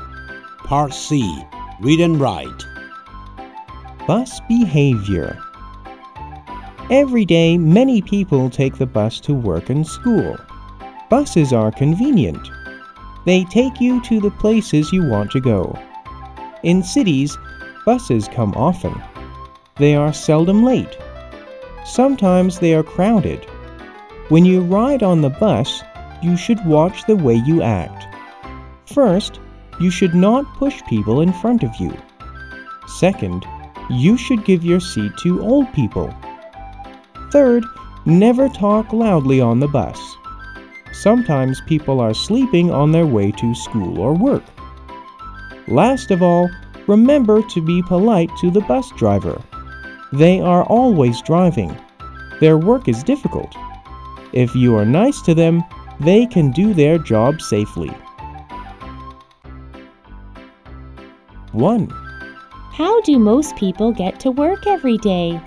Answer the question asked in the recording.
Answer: They take a bus to work every day.